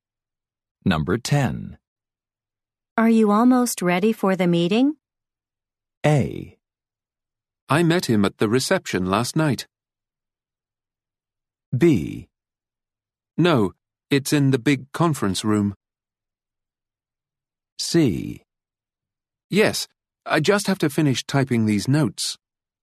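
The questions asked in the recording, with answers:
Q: Are you almost ready for the meeting?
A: C: Yes, I just have to finish typing these notes.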